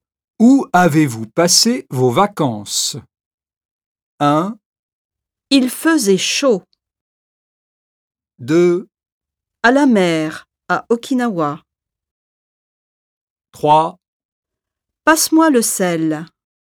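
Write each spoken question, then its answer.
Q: Où avez-vous passé vos vacances ?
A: 2: À la mer, à Okinawa.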